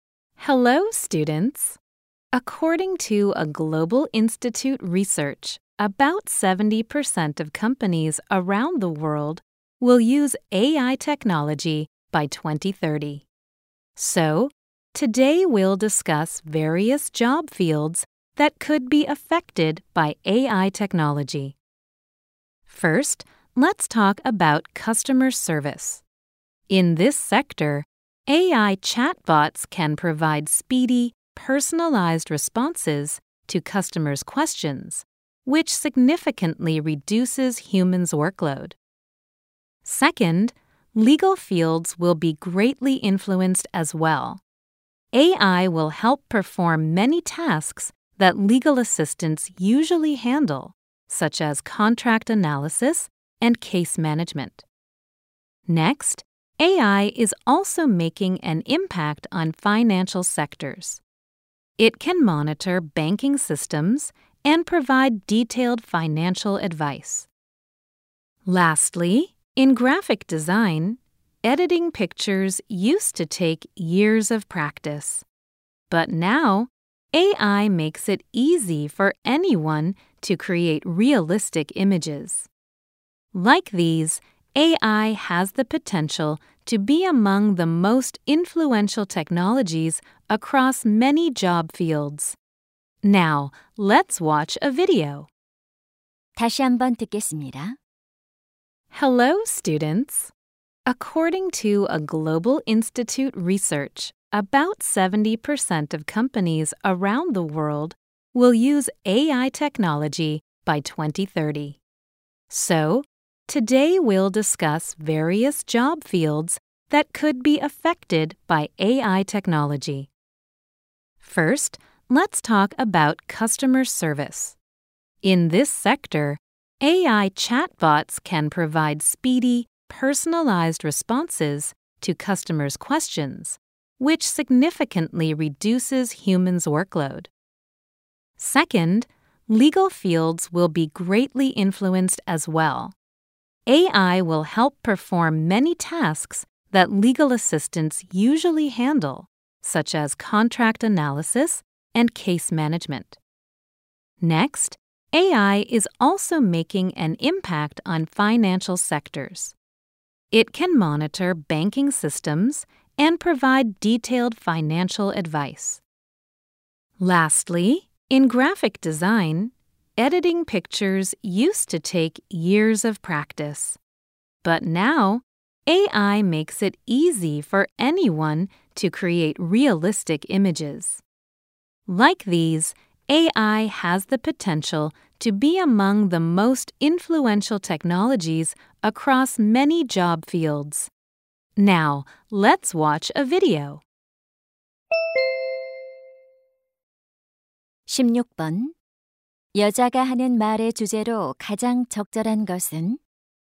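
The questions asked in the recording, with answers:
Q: 여자가 하는 말의 주제로 가장 적절한 것은?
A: AI 기술의 영향을 받을 수 있는 다양한 직업 분야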